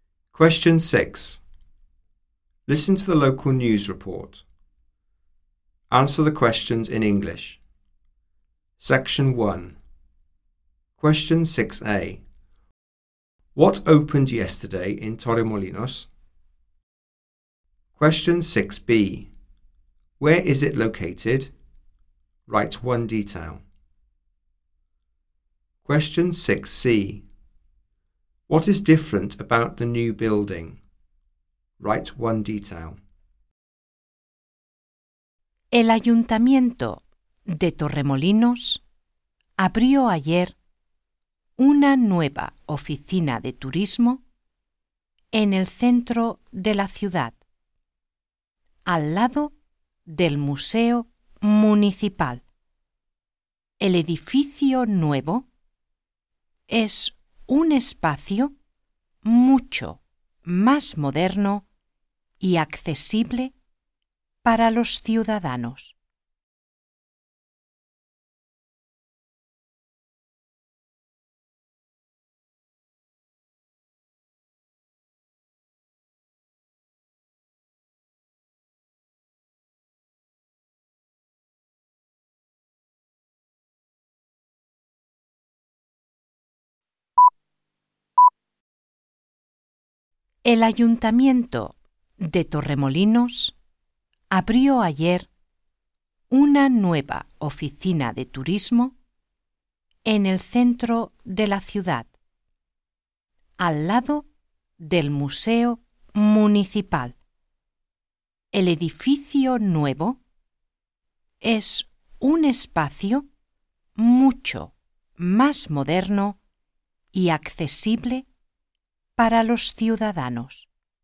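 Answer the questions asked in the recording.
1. A new tourist office
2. In the town centre, next to the Municipal Museum
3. It is more modern and accessible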